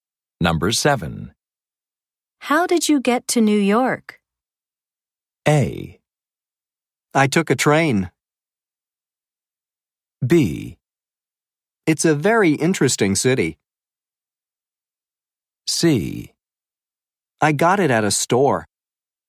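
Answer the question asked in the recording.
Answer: A: I took a train.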